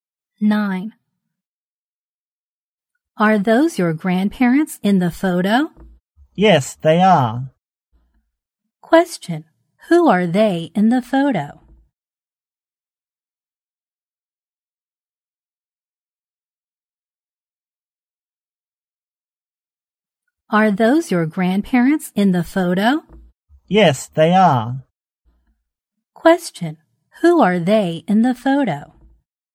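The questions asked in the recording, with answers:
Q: who are they in the photo?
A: The grandparents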